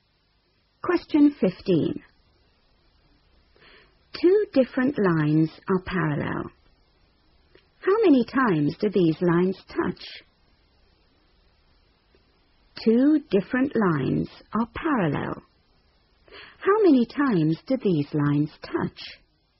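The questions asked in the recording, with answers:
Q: How many times do these lines touch?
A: 0 (never)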